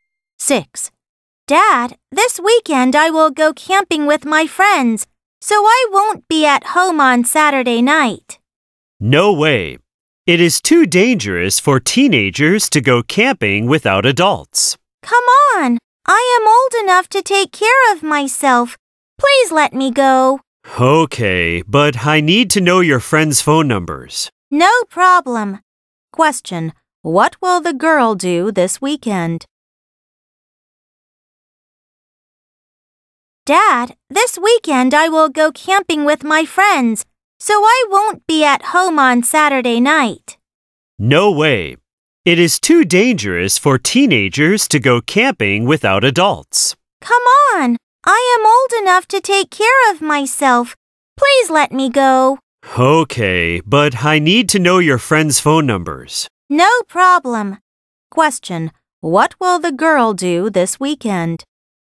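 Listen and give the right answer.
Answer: Go camping with her friends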